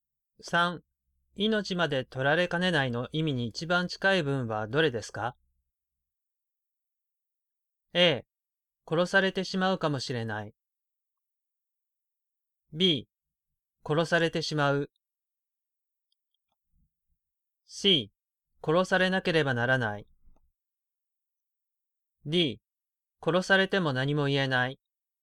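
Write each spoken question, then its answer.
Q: 命まで取られかねないの意味に一番近い文はどれですか?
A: A: 殺されてしまうかもしれない。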